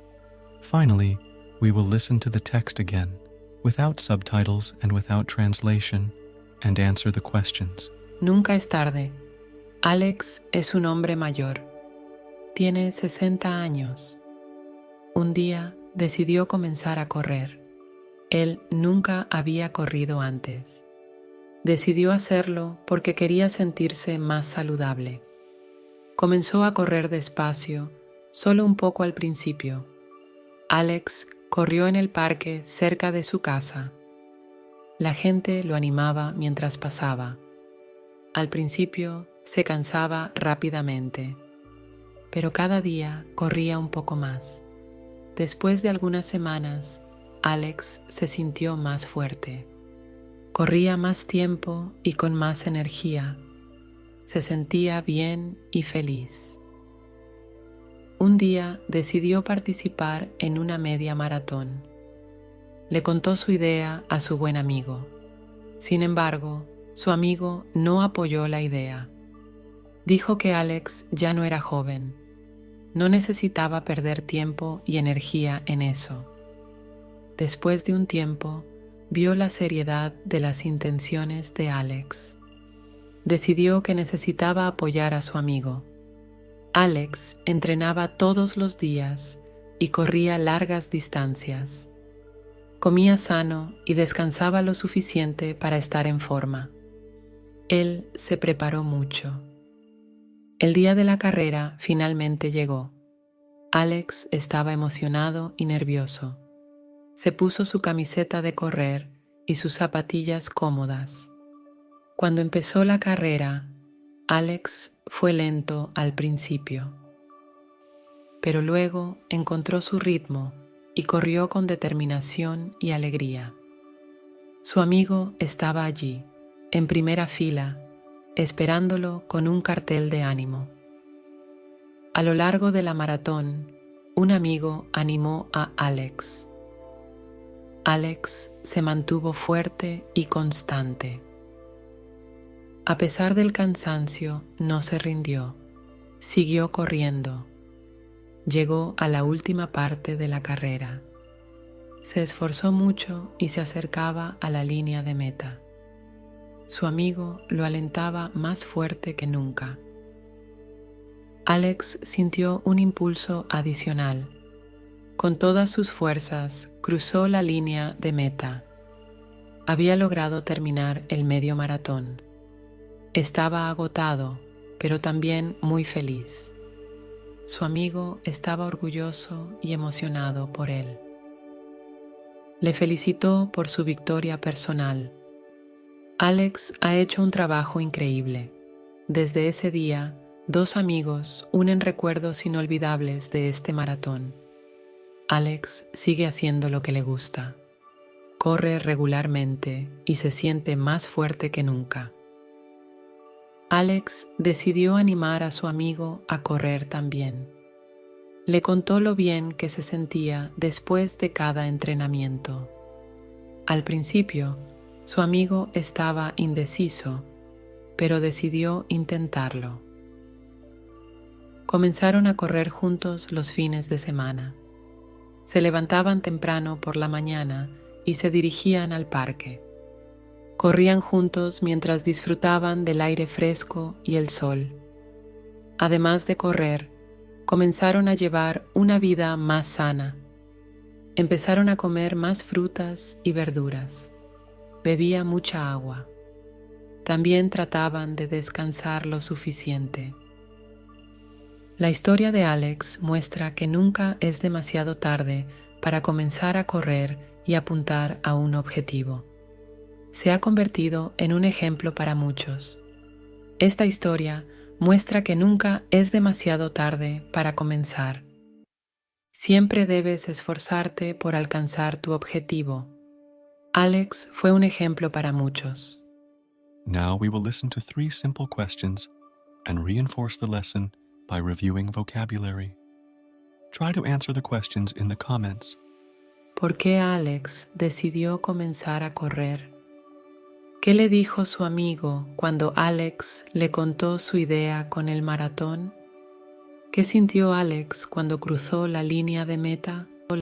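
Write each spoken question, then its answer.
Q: ¿Por qué Alex decidió comenzar a correr?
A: Porque quería sentirse más saludable

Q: ¿Qué le dijo su amigo cuando Alex le contó su idea con el maratón?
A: Que Alex ya no era joven y no necesitaba perder tiempo y energía en eso

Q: ¿Qué sintió Alex cuando cruzó la línea de meta?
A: Estaba agotado, pero también muy feliz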